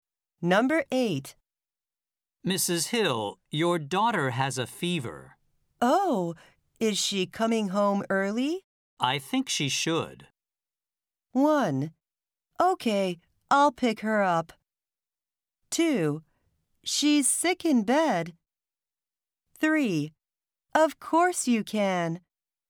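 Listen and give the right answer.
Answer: 1: Okay, I'll pick her up.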